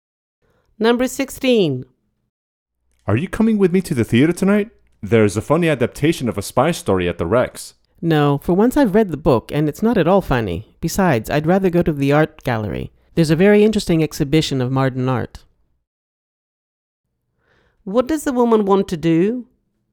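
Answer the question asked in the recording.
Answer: go to the art gallery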